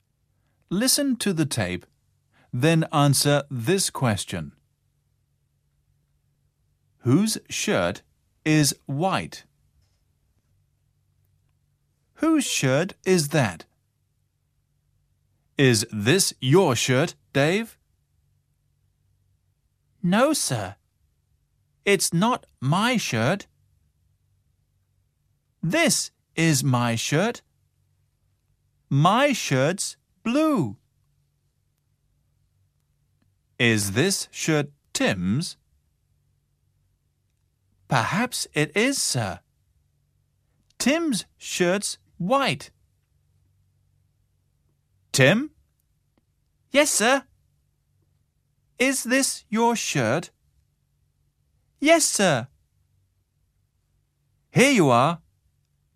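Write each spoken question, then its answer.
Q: Whose shirt is white?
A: Tim's shirt is white.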